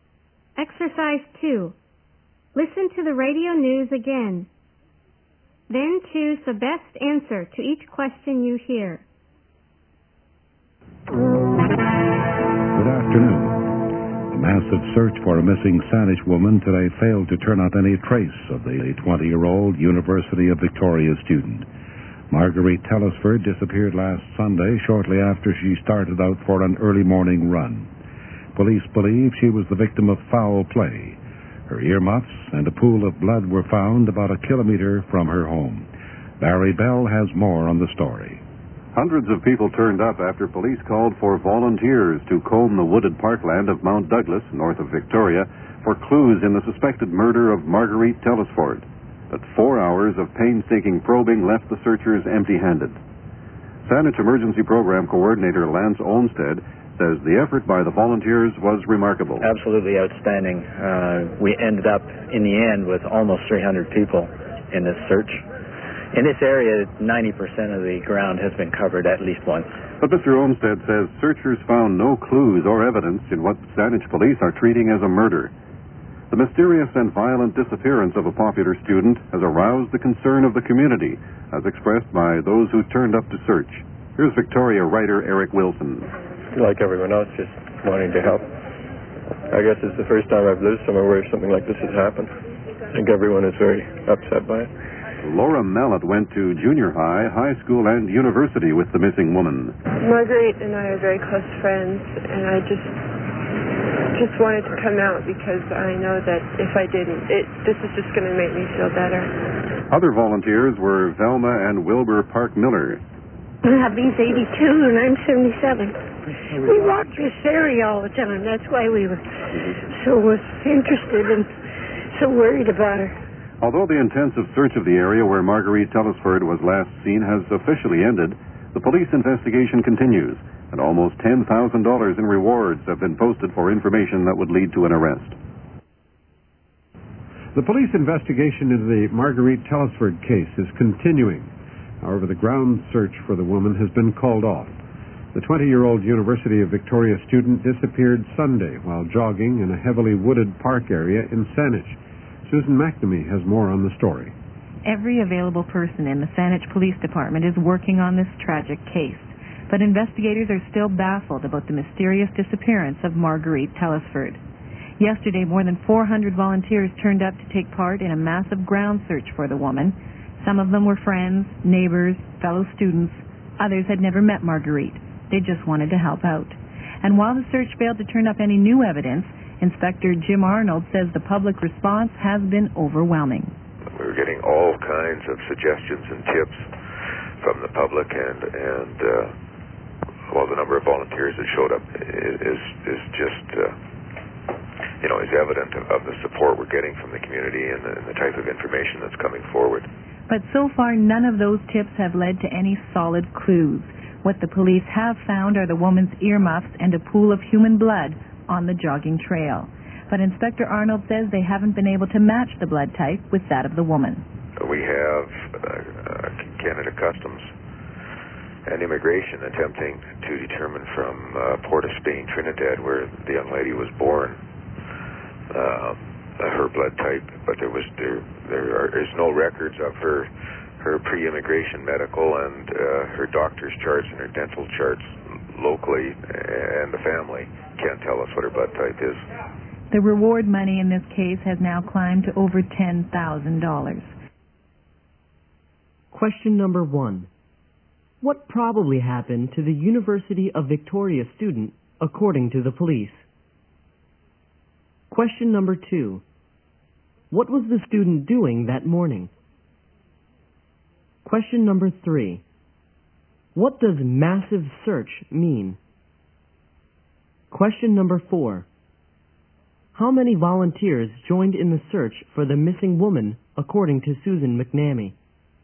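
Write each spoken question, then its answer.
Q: What probably happened to the University of Victoria student, according to the police?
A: She was probably the victim of foul play (murdered).

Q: What was the student doing that morning?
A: Jogging (going for an early morning run).

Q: What does massive search mean?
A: A very large search involving many people.

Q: How many volunteers joined in the search for the missing woman, according to Susan McNamee?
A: More than 400.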